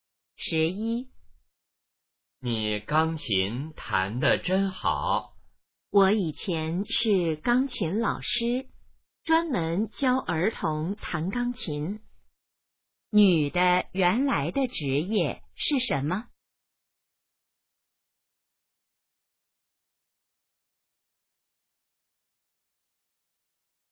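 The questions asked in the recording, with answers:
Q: 女的原来的职业是什么?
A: 钢琴老师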